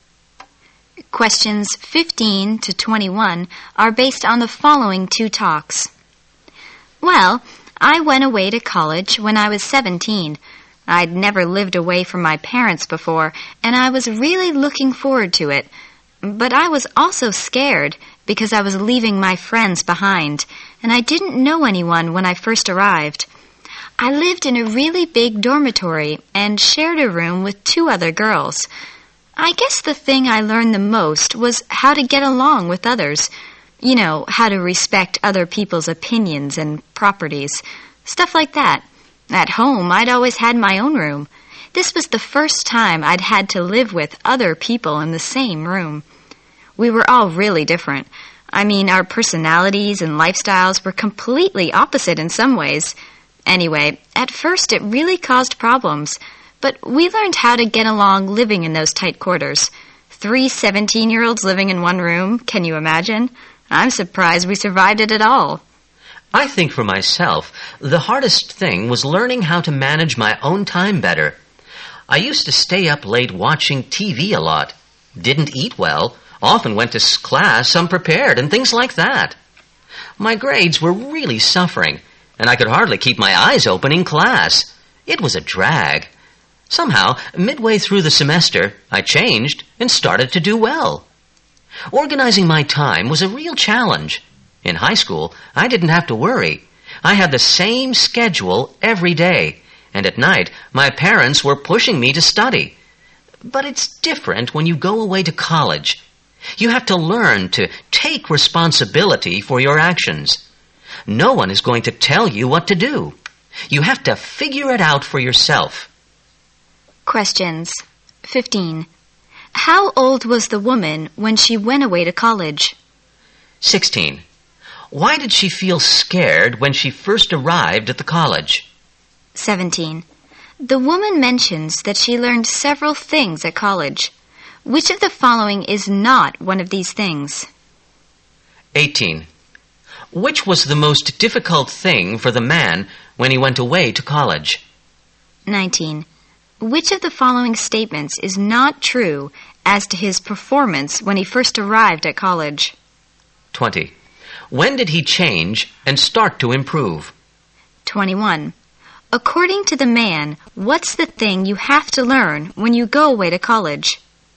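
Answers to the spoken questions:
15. 17
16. She was leaving her friends behind and didn't know anyone
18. Learning to manage his own time
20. Midway through the semester
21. To take responsibility for your actions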